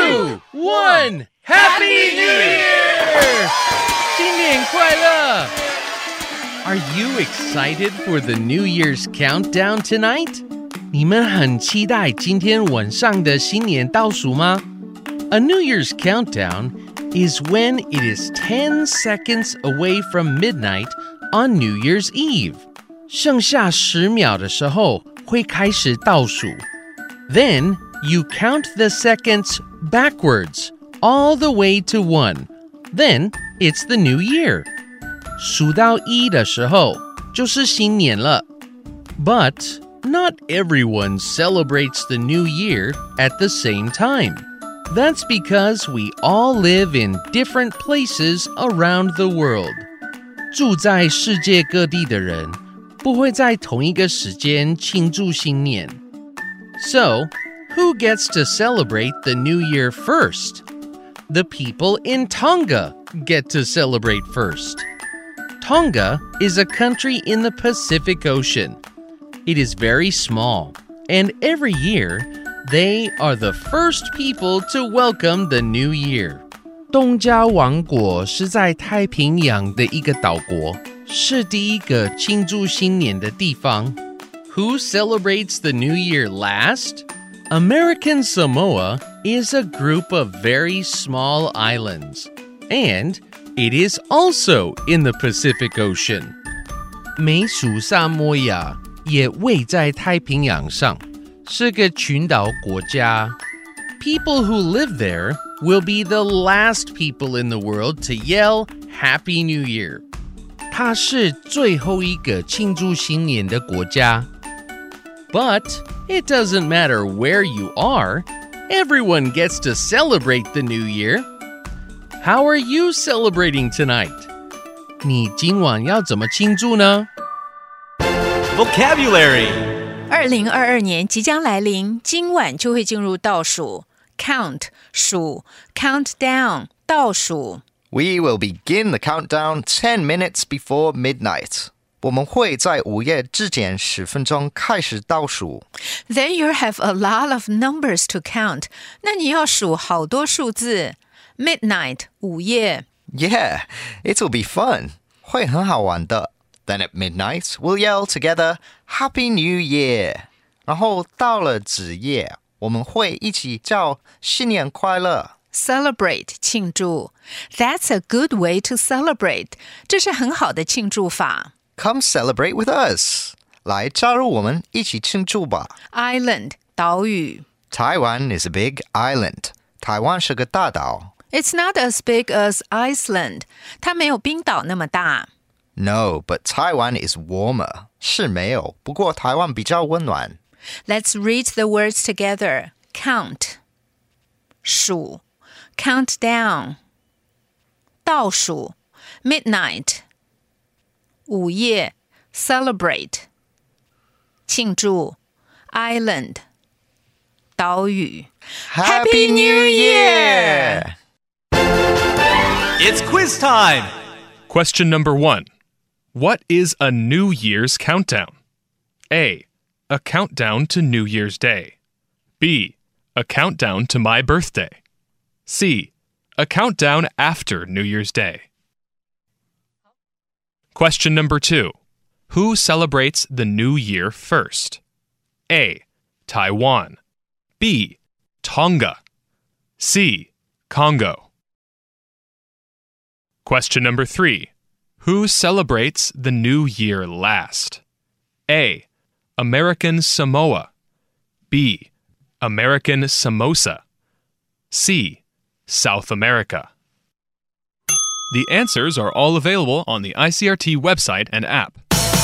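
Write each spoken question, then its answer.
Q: What is a New Year's countdown?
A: A: A countdown to New Year's Day.

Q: Who celebrates the New Year first?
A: B: Tonga.

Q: Who celebrates the New Year last?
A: A: American Samoa.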